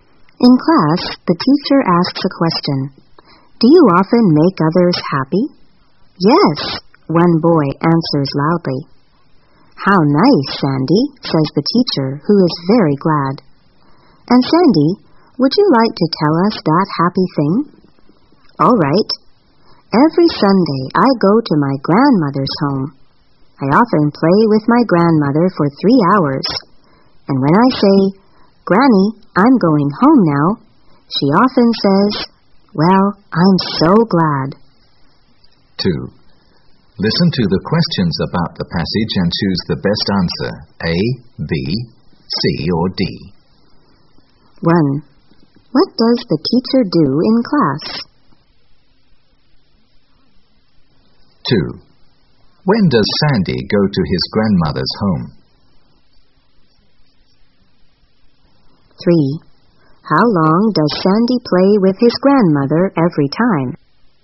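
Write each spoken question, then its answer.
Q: What does the teacher do in class?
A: She asks a question.

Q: When does Sandy go to his grandmother's home?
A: Every Sunday

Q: How long does Sandy play with his grandmother every time?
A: For 3 hours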